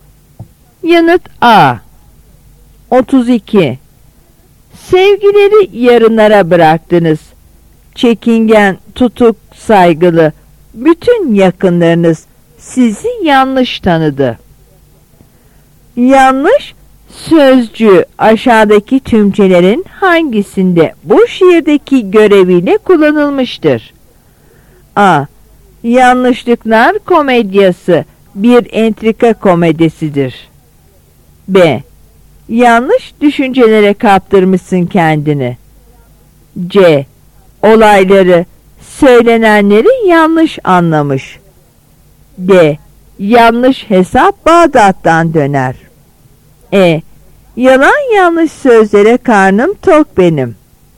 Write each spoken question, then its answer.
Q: Yanlış sözcüğü aşağıdaki tümcelerin hangisinde bu şiirdeki göreviyle kullanılmıştır?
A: Yanıt C.